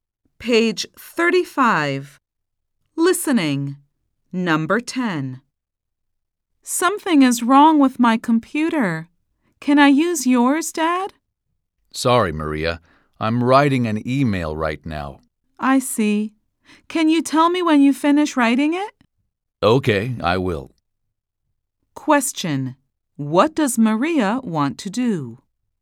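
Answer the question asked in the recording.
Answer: Use her dad's computer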